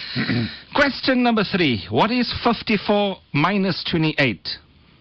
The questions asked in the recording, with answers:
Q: What is 54 minus 28?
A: 26 is the correct answer, mashallah.